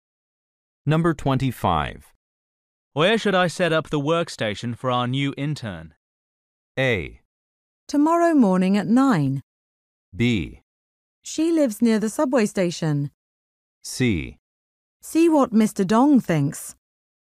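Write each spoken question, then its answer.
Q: Where should I set up the workstation for our new intern?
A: C: See what Mr. Dong thinks.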